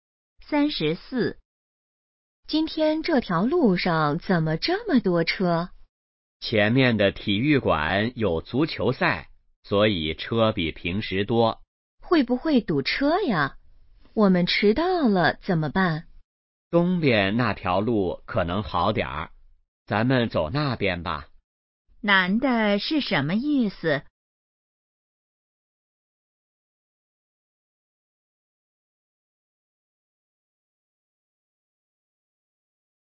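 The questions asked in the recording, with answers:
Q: 男的是什么意思?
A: 走东边那条路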